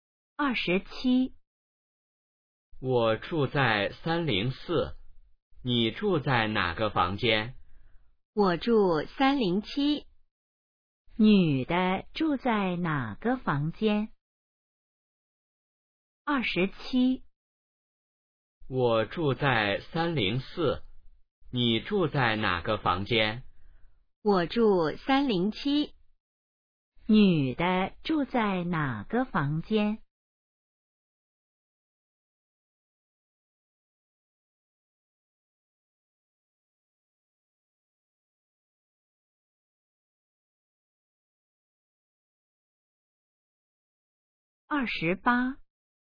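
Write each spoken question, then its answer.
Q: 女的住在哪个房间?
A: 307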